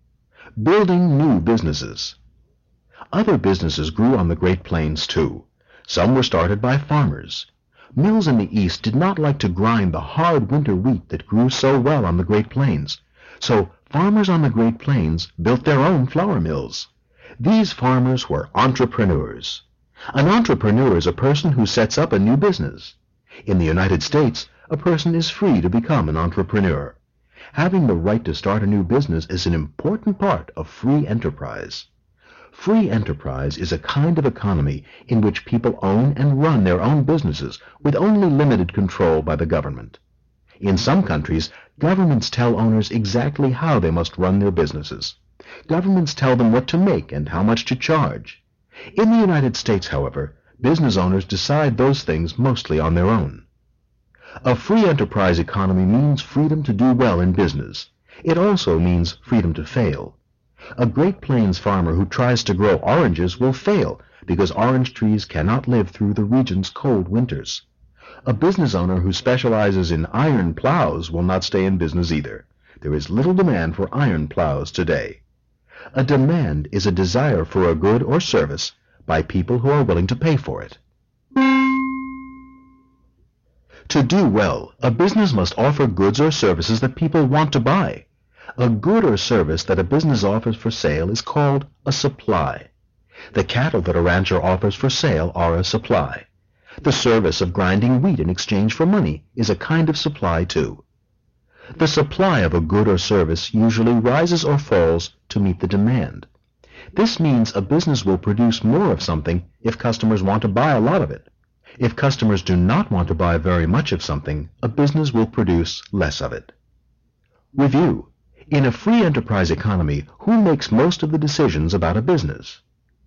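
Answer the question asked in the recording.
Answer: The business owners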